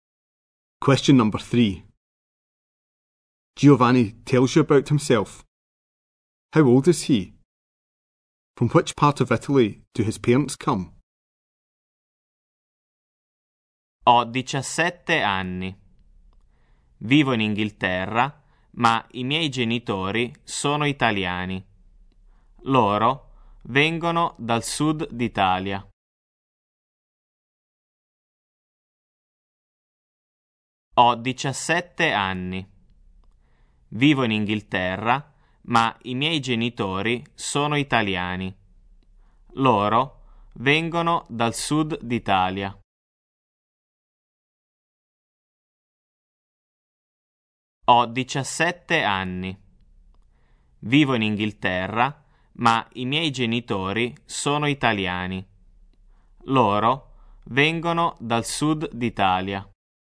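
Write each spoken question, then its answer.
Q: How old is he?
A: 17

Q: From which part of Italy do his parents come?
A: The south of Italy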